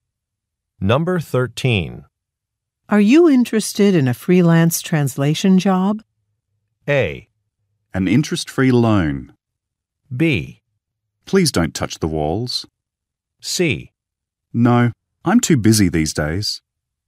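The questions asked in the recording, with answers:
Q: Are you interested in a freelance translation job?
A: C: No, I'm too busy these days.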